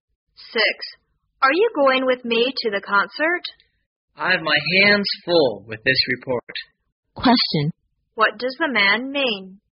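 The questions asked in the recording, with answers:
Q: What does the man mean?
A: He is too busy with his report to go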